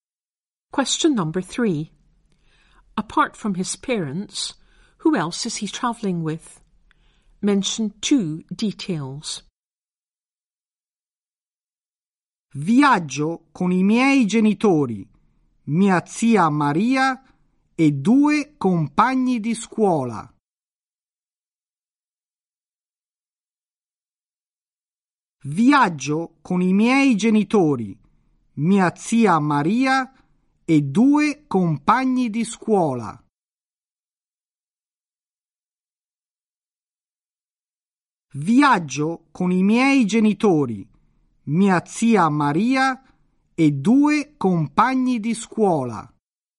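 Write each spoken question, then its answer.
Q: Apart from his parents, who else is he travelling with?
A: His aunt Maria and two school friends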